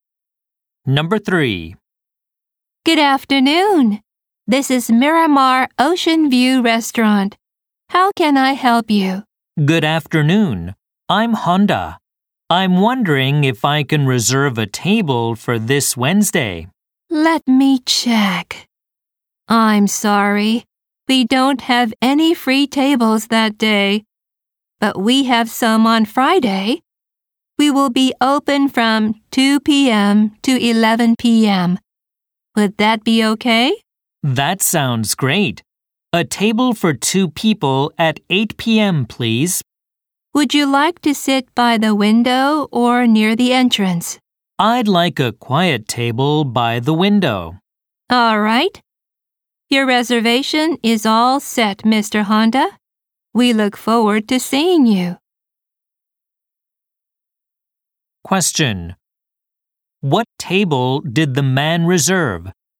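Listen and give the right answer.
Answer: A quiet table for two by the window at 8 p.m. on Friday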